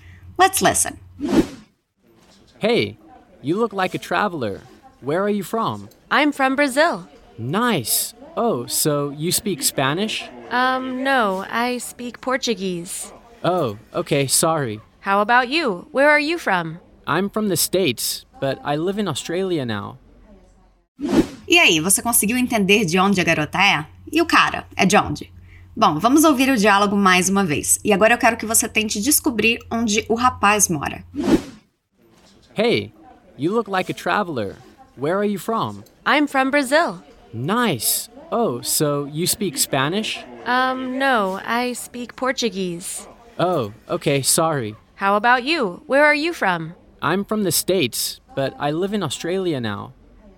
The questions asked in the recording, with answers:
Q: E aí, você conseguiu entender de onde a garota é?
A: A garota é do Brasil

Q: E o cara é de onde?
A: e o rapaz é americano.